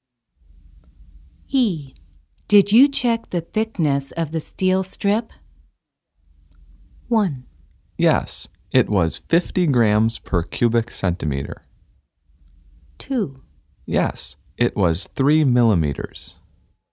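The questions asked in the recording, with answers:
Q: Did you check the thickness of the steel strip?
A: 2: Yes, it was 3 millimeters.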